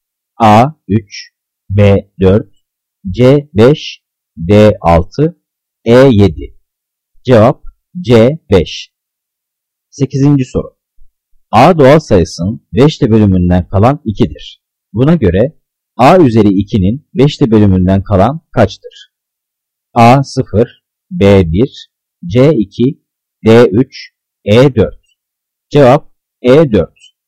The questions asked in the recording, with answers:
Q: Buna göre A üzeri 2'nin 5'te bölümünden kalan kaçtır?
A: Cevap E 4.